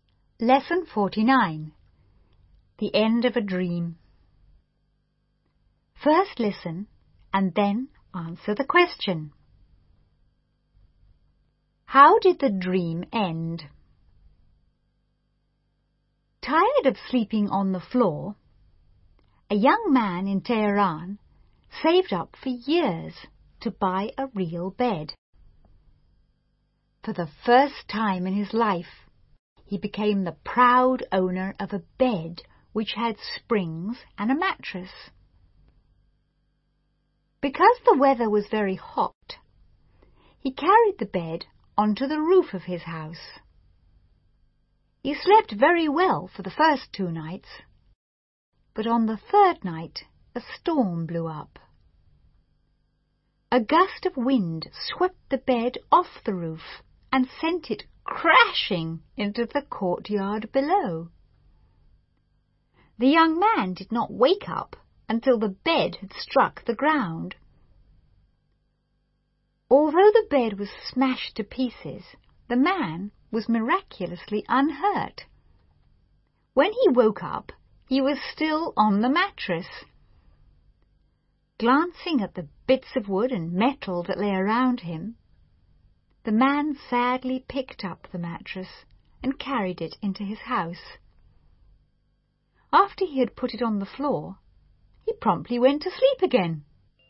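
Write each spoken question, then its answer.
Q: How did the dream end?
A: The bed was blown off the roof and smashed, so he went back to sleeping on the mattress on the floor.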